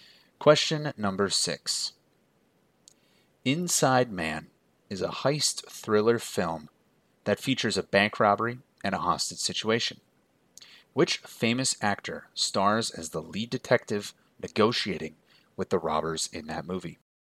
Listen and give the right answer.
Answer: And that actor was my man, Denzel Washington.